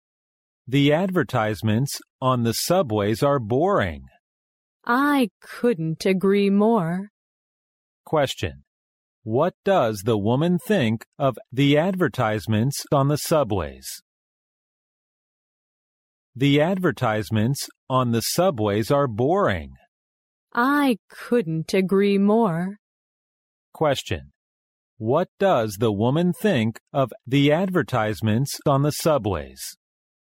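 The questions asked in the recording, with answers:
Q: What does the woman think of the advertisements on the subways?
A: They are boring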